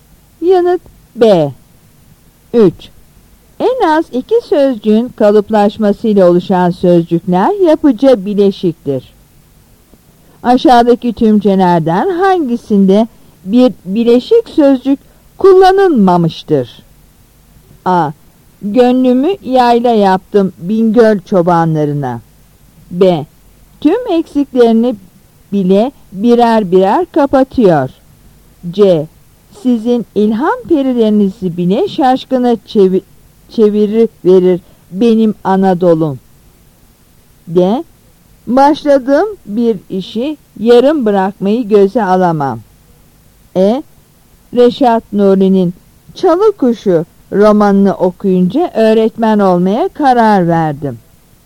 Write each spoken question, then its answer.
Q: Aşağıdaki tümcelerden hangisinde bir bileşik sözcük kullanılmamıştır?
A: Yanıt B.